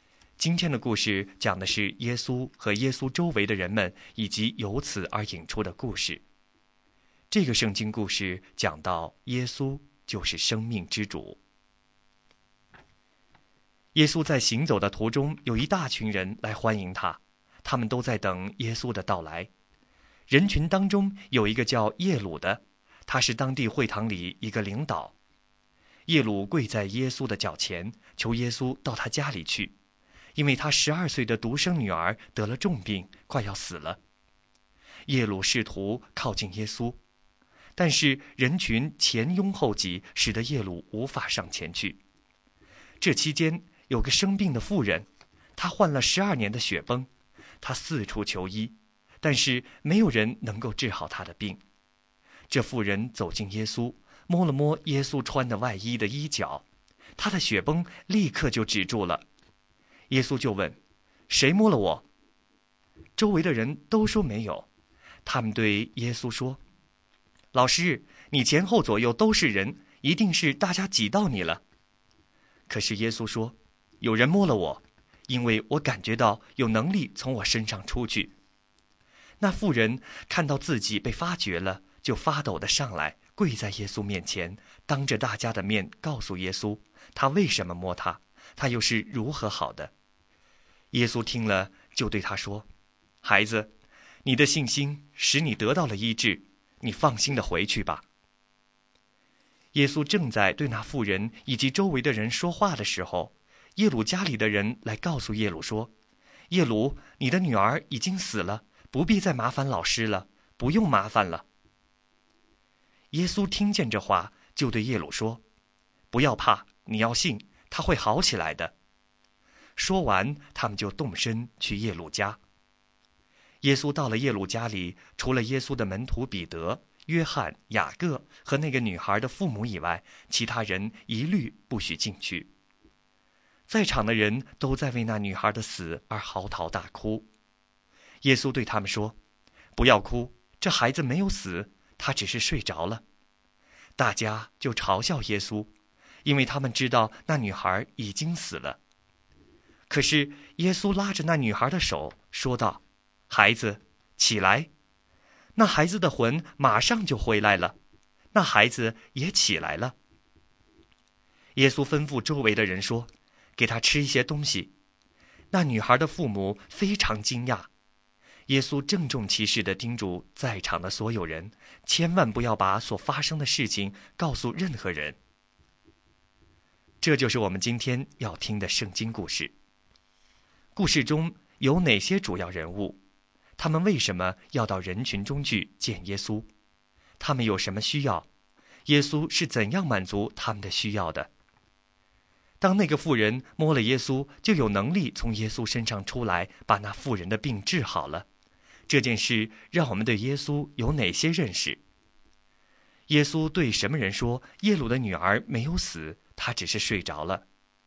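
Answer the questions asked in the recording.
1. 耶稣、耶鲁、耶鲁的女儿和患血崩的妇人
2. 他治好了那妇人的血崩,又使耶鲁的女儿复活
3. 对在耶鲁家里为那女孩的死嚎啕大哭的人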